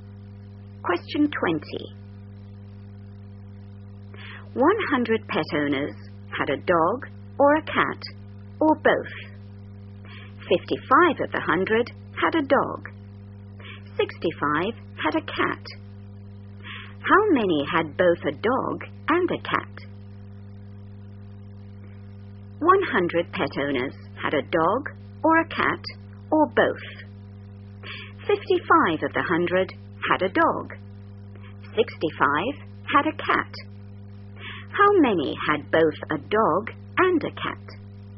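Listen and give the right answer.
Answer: 20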